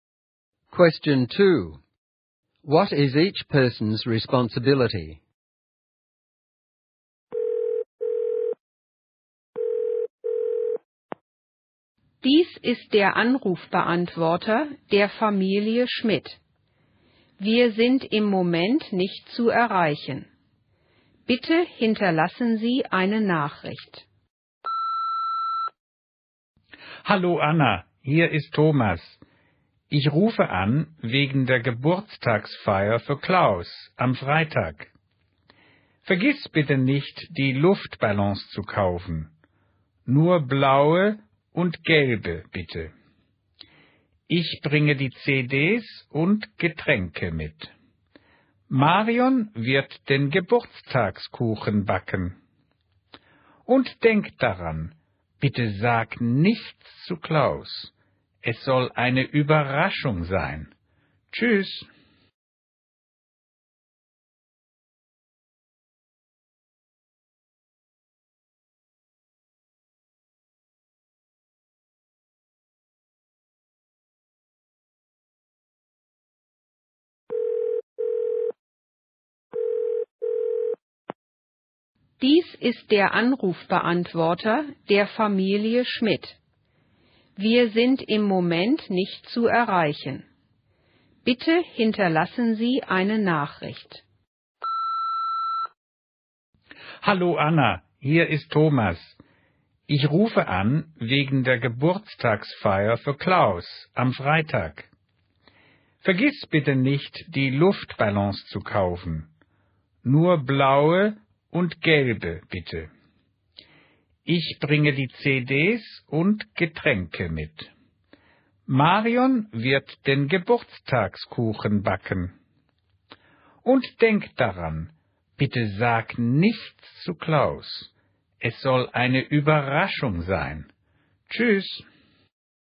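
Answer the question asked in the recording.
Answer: Anna: buy blue and yellow balloons; Thomas: bring CDs and drinks; Marion: bake the birthday cake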